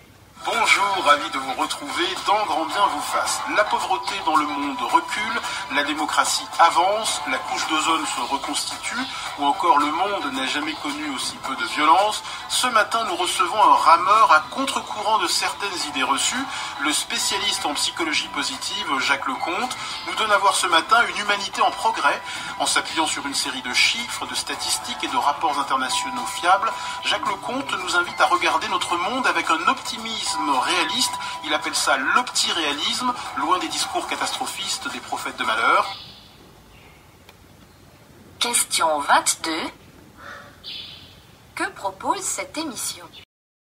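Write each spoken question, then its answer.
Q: Que propose cette émission ?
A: Un regard optimiste et réaliste (l'opti-réalisme) sur une humanité en progrès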